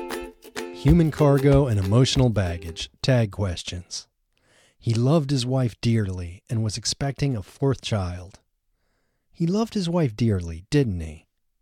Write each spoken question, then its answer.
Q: He loved his wife dearly, didn't he?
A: Yes, he loved his wife dearly.